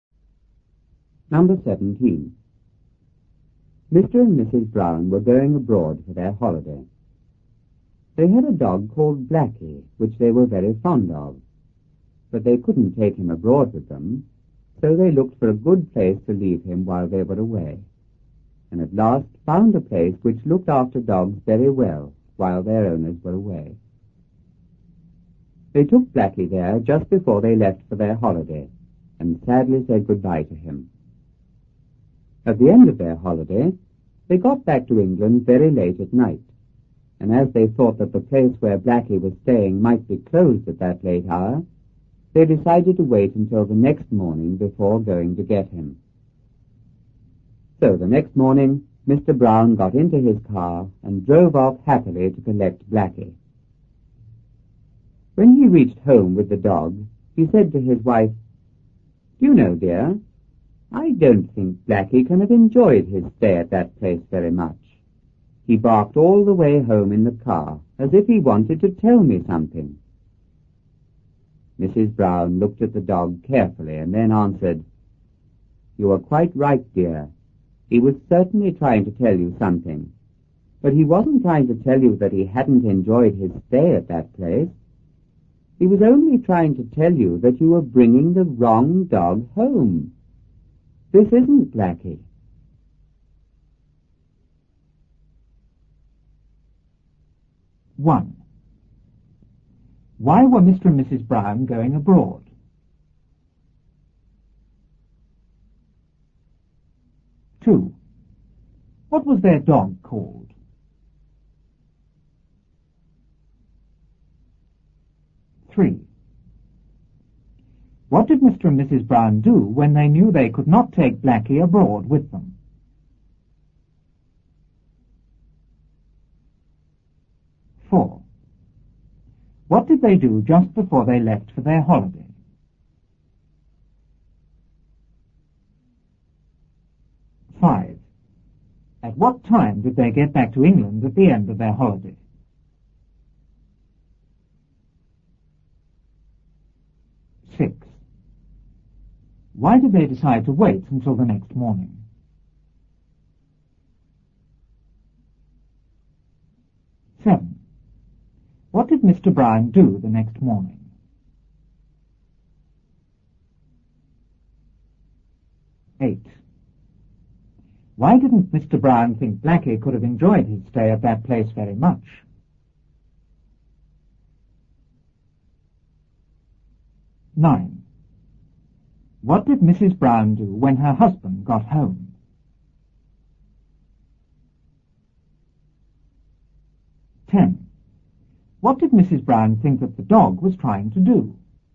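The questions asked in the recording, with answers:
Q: Why were Mr. and Mrs. Brown going abroad?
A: For their holiday

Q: What was their dog called?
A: Blackie

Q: What did Mr. and Mrs. Brown do when they knew they could not take Blackie abroad with them?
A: They looked for a good place to leave him while they were away

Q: What did they do just before they left for their holiday?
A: They took Blackie to the place that looked after dogs and said goodbye to him

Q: At what time did they get back to England at the end of their holiday?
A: Very late at night

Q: Why did they decide to wait until the next morning?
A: They thought the place where Blackie was staying might be closed at that late hour

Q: What did Mr. Brown do the next morning?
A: He drove off in his car to collect Blackie

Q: Why didn't Mr. Brown think Blackie could have enjoyed his stay at that place very much?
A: Because the dog barked all the way home in the car

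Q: What did Mrs. Brown do when her husband got home?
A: She looked at the dog carefully

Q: What did Mrs. Brown think that the dog was trying to do?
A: To tell Mr. Brown that he was bringing the wrong dog home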